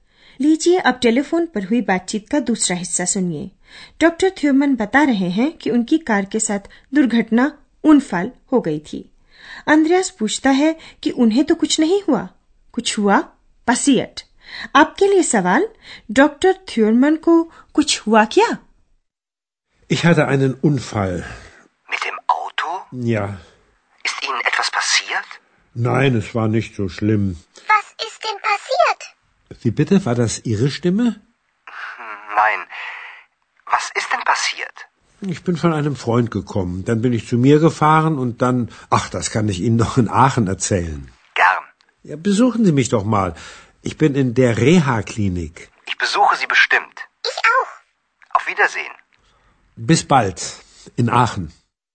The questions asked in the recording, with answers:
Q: doctor थ्योरमन को कुछ हुआ क्या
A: तो doctor थ्योरमन को कम से कम गंभीर कुछ नहीं हुआ